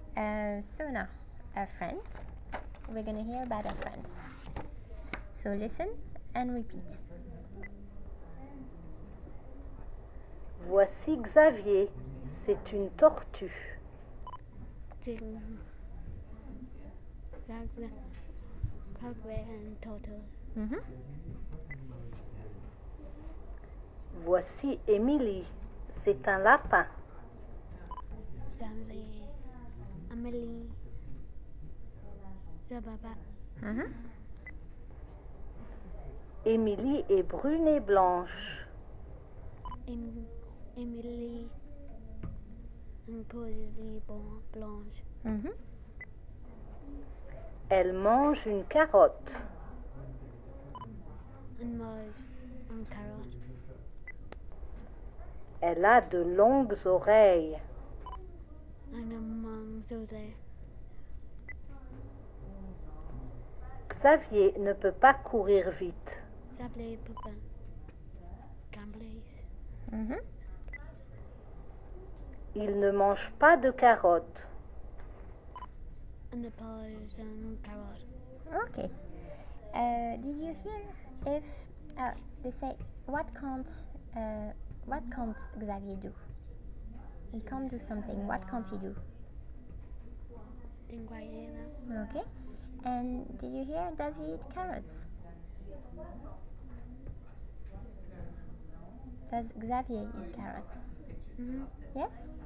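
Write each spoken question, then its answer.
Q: He can't do something. What can't he do?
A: Run fast

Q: Does Xavier eat carrots? Yes?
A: No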